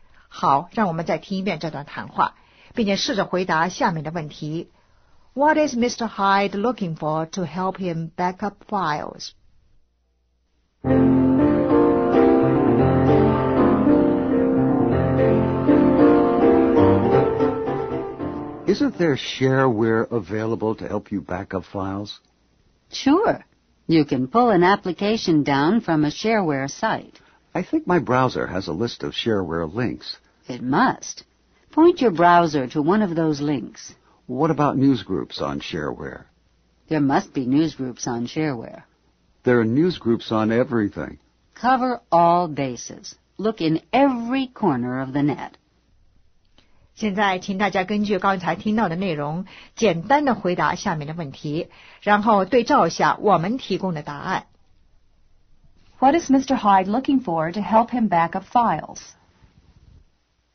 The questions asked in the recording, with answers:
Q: What is Mr. Hyde looking for to help him back up files?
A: Shareware.